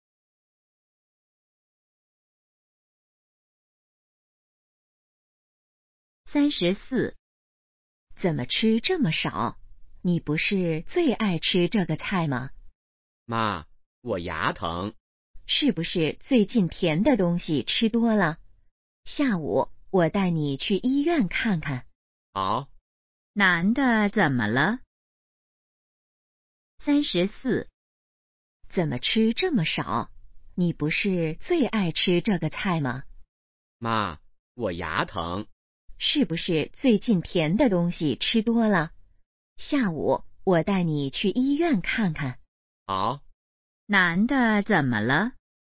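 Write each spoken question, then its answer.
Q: 男的怎么了?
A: 牙疼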